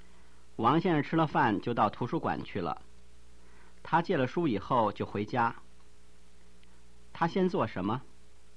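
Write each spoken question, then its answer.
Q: 他先做什么?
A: 吃饭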